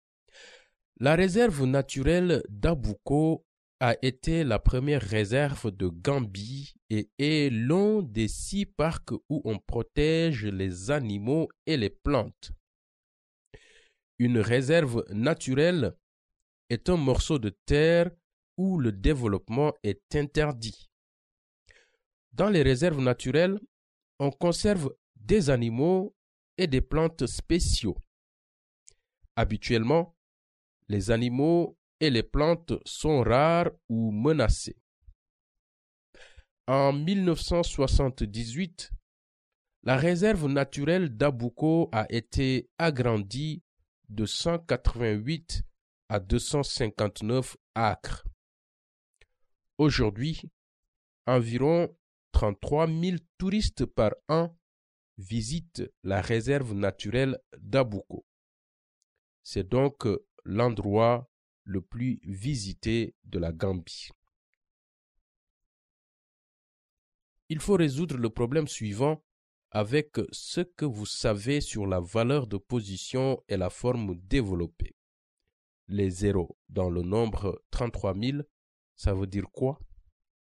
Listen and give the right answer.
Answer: Ça veut dire qu'il n'y a pas de nombre ou de quantité dans ces positions?